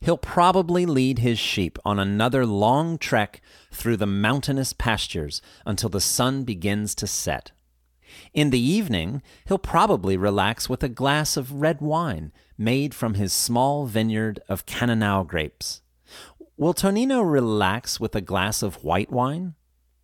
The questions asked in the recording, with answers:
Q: Will Tonino relax with a glass of white wine?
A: No, he probably won't. He'll probably relax with a glass of red wine.